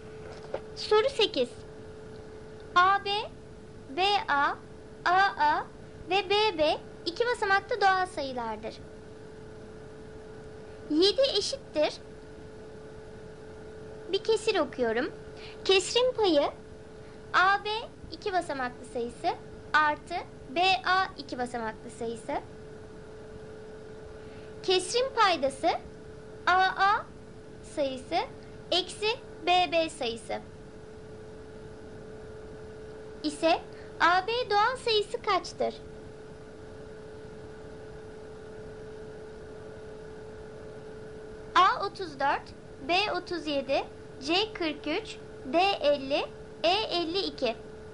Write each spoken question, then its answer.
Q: ise AB doğal sayısı kaçtır?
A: Doğru cevap C 43.